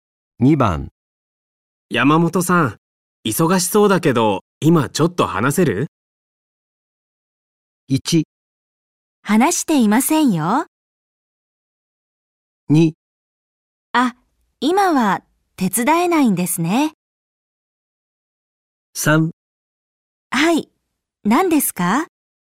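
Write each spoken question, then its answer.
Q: 山本さん、忙しそうだけど、今ちょっと話せる?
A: 3: はい、何ですか?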